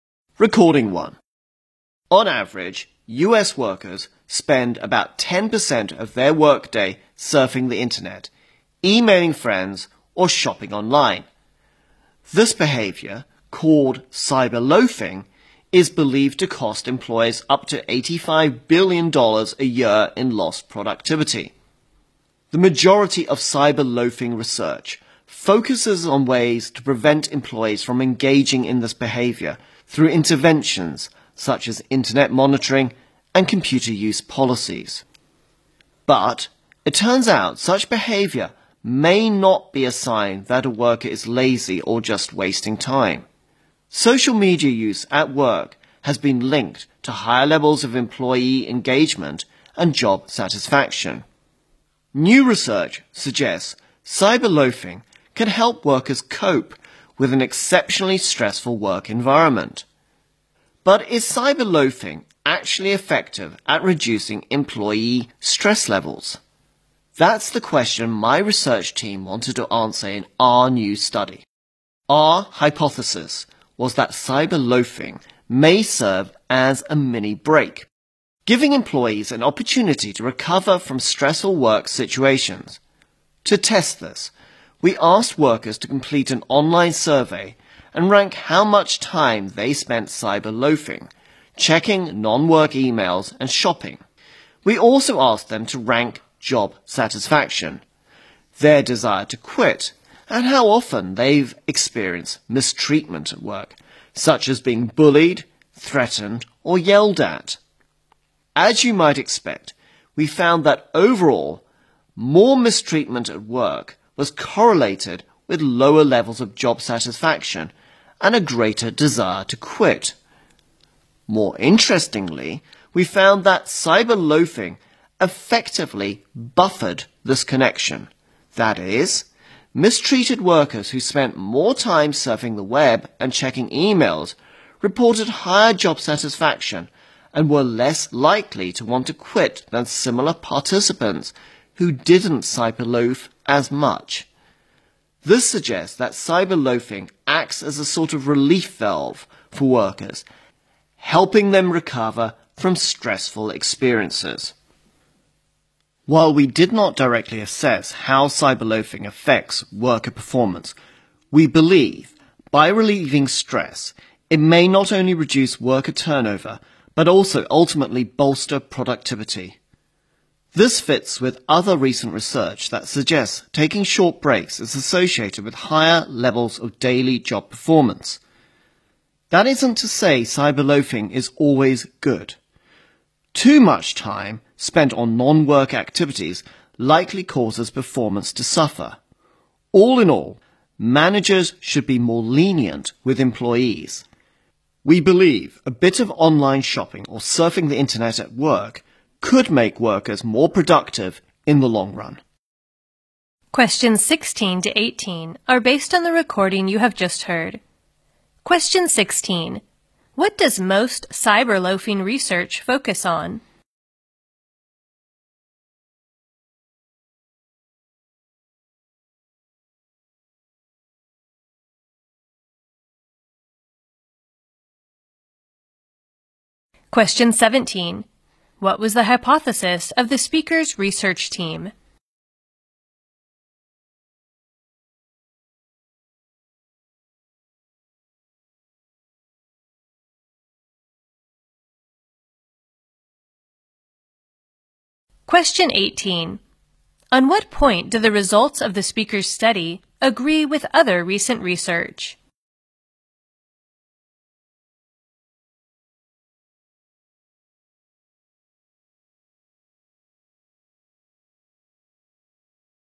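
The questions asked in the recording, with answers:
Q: What does most cyberloafing research focus on?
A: Ways to prevent employees from cyberloafing.

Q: What was the hypothesis of the speaker's research team?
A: Cyberloafing may serve as a mini break to help employees recover from stressful work situations.

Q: On what point do the results of the speaker's study agree with other recent research?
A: Taking short breaks is associated with higher job performance.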